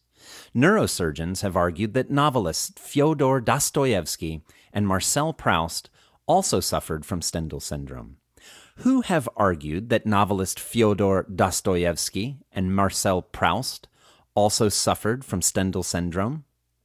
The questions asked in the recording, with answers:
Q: Who have argued that novelist Fyodor Dostoevsky and Marcel Proust also suffered from Stendhal syndrome?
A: Neurosurgeons have argued that novelist Fyodor Dostoevsky and Marcel Proust also suffered from Stendhal syndrome.